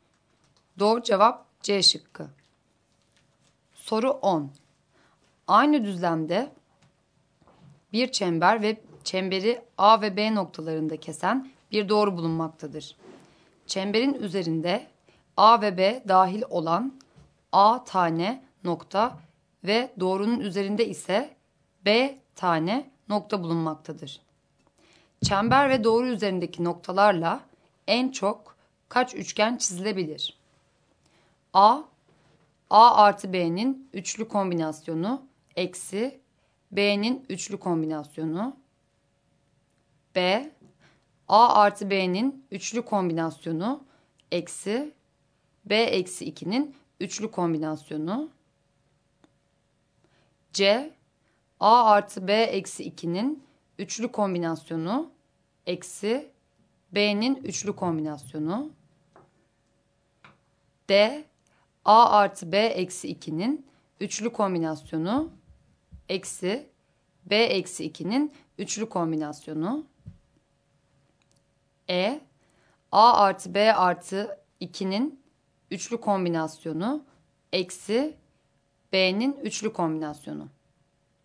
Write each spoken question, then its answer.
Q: Çember ve doğru üzerindeki noktalarla en çok kaç üçgen çizilebilir?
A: Doğru cevap C şıkkı.